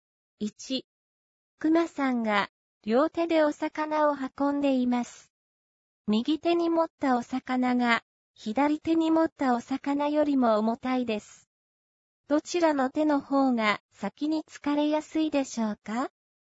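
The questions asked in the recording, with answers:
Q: どちらの手の方が先に疲れやすいでしょうか?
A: 右手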